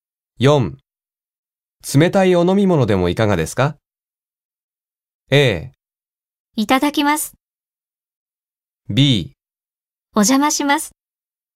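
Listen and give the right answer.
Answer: A: いただきます。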